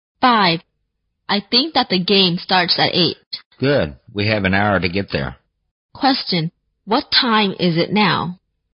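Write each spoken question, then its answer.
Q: what time is it now?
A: 7 o'clock.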